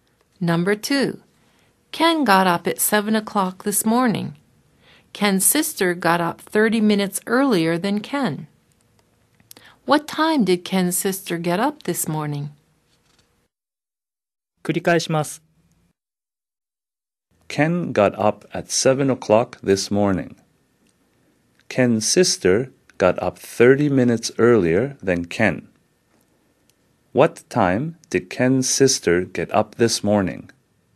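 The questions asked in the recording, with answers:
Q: What time did Ken's sister get up this morning?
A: At 6:30.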